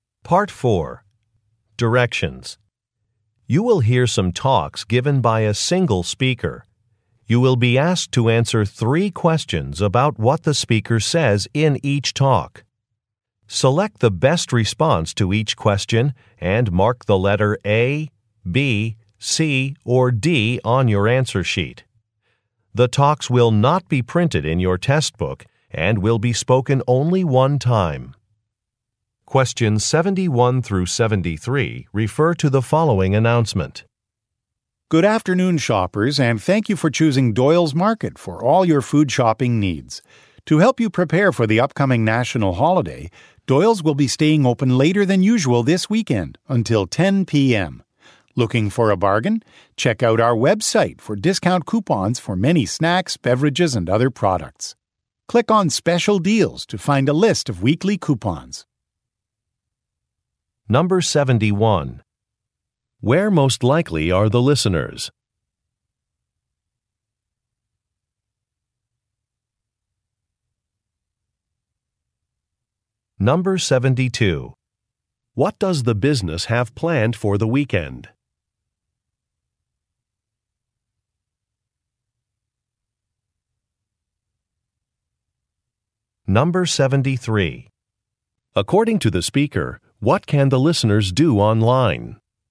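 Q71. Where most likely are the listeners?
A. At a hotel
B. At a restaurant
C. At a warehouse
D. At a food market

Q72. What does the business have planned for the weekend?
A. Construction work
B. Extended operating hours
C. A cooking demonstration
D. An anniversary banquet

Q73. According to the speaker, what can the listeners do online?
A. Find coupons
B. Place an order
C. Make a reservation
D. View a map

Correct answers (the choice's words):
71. At a food market
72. Extended operating hours
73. Find coupons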